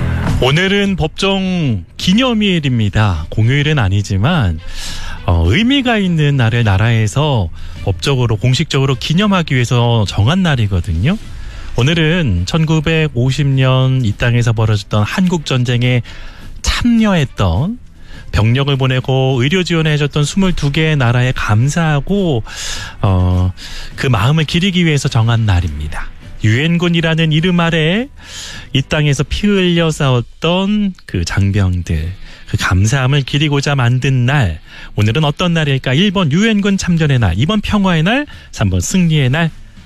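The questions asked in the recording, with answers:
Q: 오늘은 어떤 날일까? 1번 유엔군 참전의 날, 2번 평화의 날, 3번 승리의 날.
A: 1번: 유엔군 참전의 날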